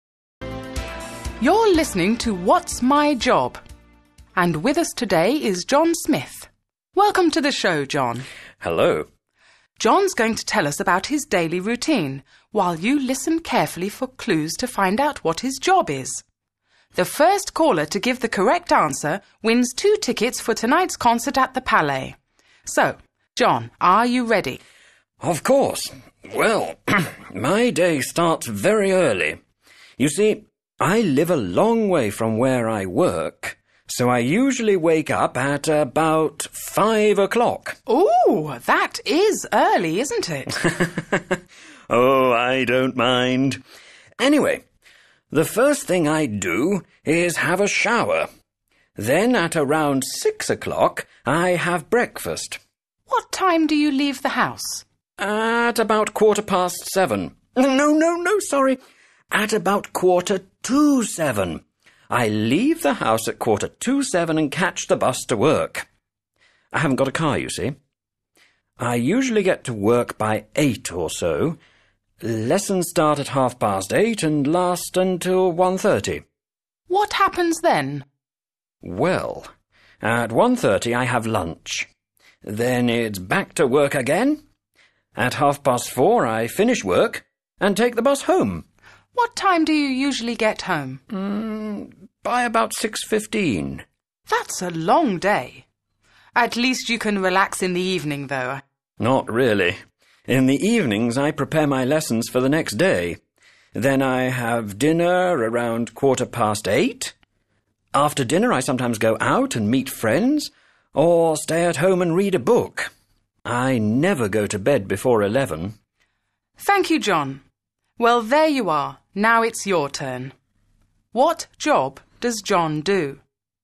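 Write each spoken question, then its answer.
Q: What job does John do?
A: He is a teacher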